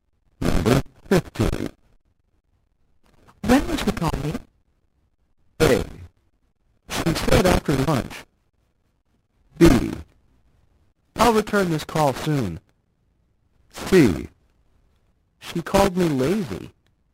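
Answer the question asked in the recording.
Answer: A: She said after lunch.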